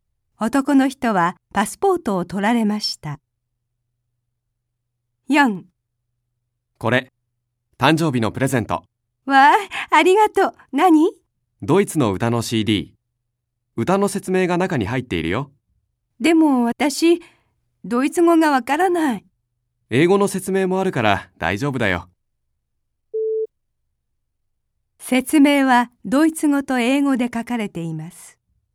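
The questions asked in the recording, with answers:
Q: 説明はドイツ語と英語で書かれています。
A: はい(正しい)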